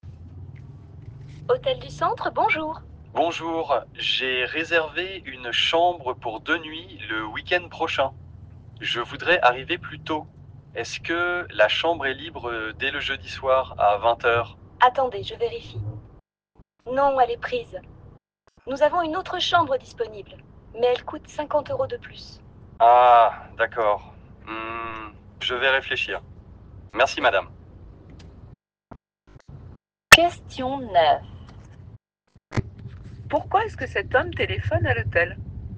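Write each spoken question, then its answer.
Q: Pourquoi est-ce que cet homme téléphone à l'hôtel ?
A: Pour arriver plus tôt (dès le jeudi soir) et modifier sa réservation.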